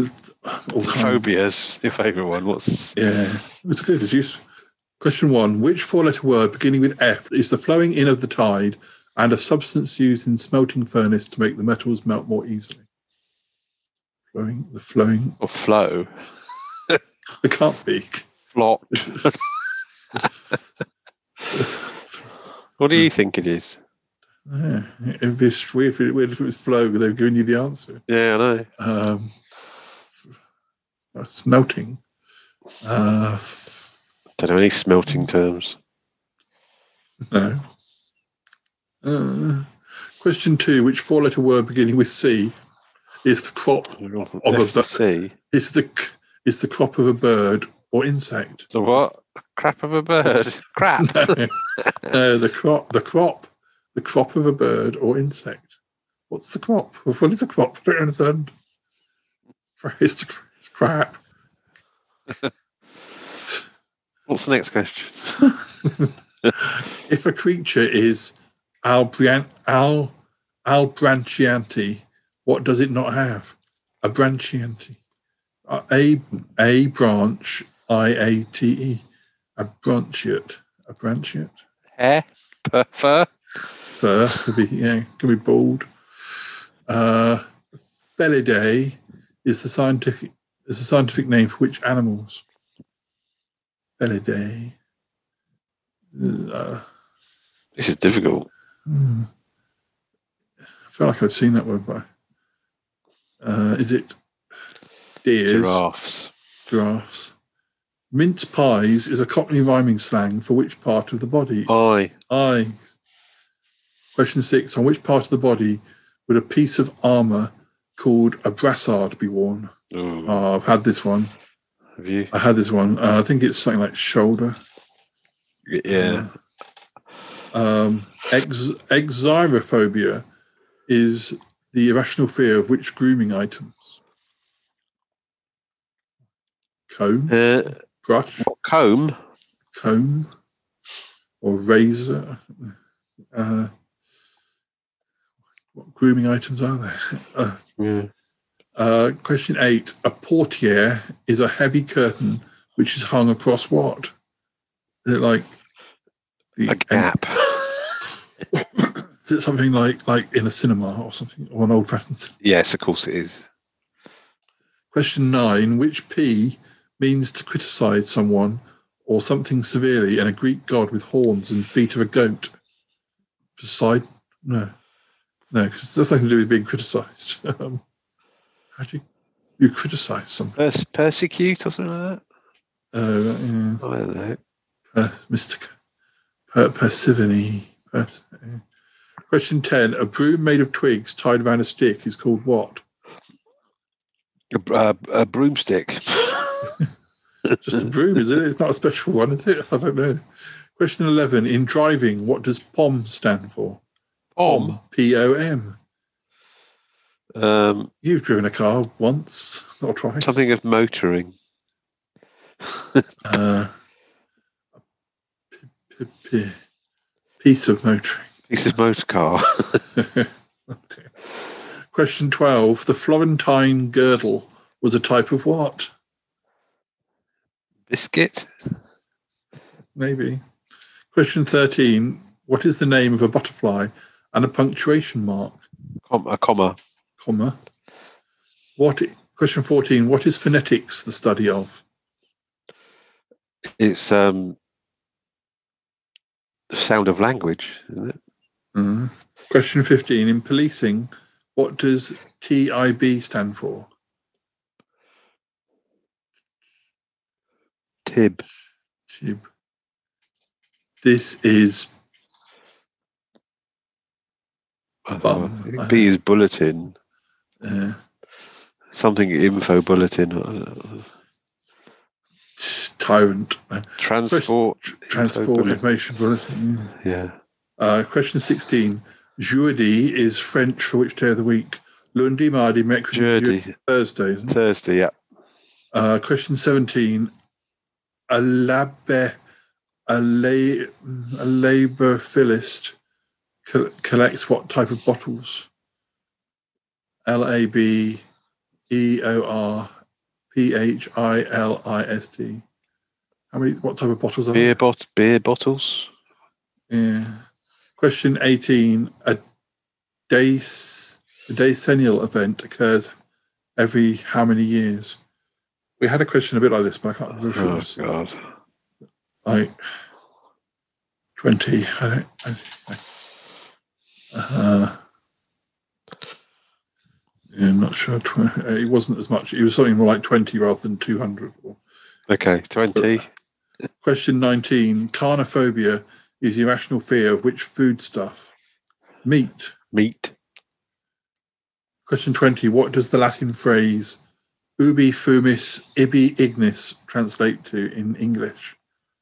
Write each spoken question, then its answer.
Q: What is the name of a butterfly and a punctuation mark?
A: Comma.

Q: What is phonetics the study of?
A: Phonetics is the study of speech sounds.

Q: Jeudi is French for which day of the week?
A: Jeudi is French for Thursday.

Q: A labor philist collects what type of bottles?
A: they collect beer bottles.

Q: Carnophobia is irrational fear of which foodstuff?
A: Carnophobia is the irrational fear of meat.